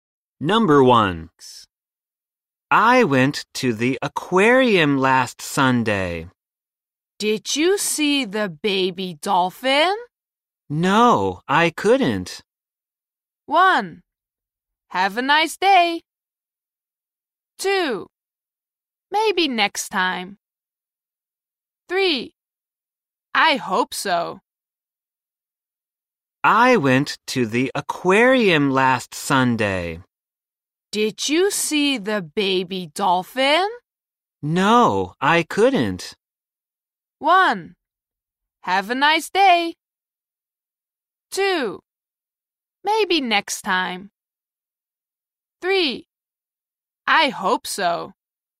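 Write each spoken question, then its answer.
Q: Did you see the baby dolphin?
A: 2: Maybe next time.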